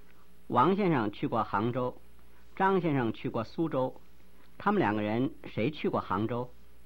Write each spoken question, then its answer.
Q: 他们两个人谁去过杭州?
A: 王先生去过杭州。